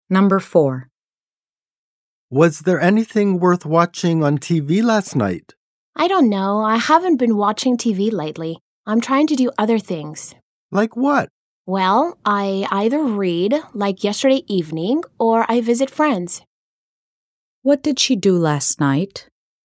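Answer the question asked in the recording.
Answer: She read.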